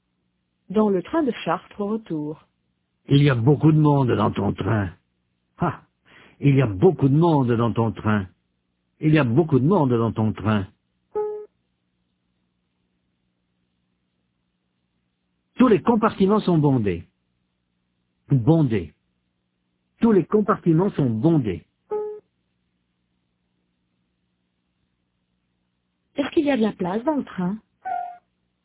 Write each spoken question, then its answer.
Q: Est-ce qu'il y a de la place dans le train?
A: Non, tous les compartiments sont bondés.